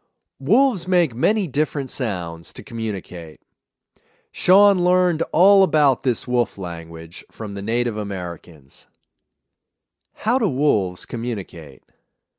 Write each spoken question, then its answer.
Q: How do wolves communicate?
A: Wolves make many different sounds to communicate.